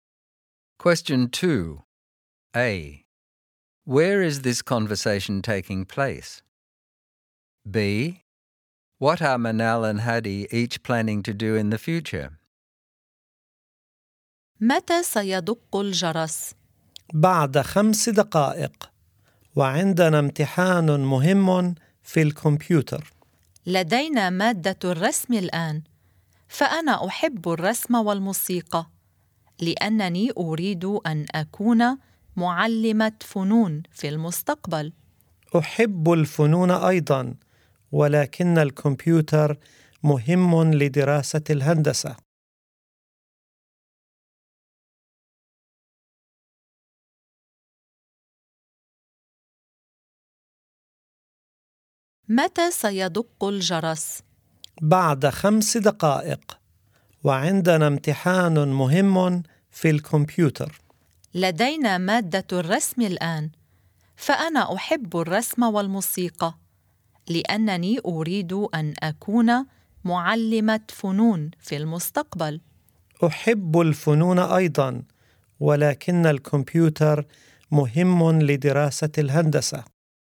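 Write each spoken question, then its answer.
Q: Where is this conversation taking place?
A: At school

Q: What are Manal and Hadi each planning to do in the future?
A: Manal wants to be an art teacher; Hadi wants to study engineering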